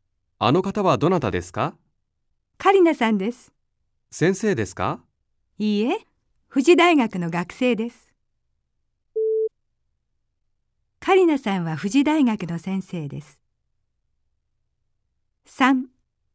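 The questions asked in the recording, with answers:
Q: カリナさんは富士大学の先生です。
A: ×(富士大学の学生です)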